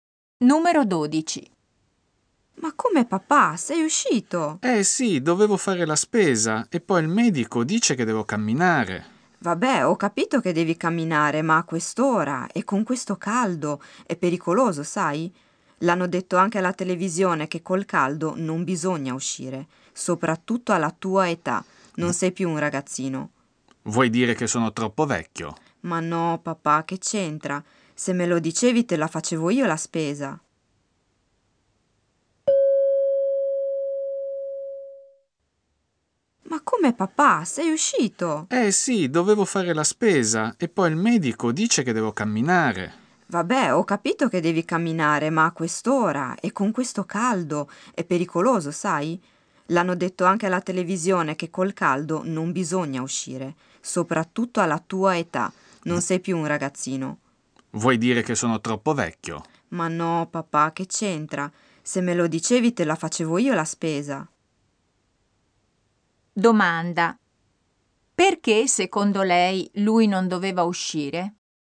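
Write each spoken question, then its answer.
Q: Perché, secondo lei, lui non doveva uscire?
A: Perché a quell'ora e con quel caldo è pericoloso alla sua età.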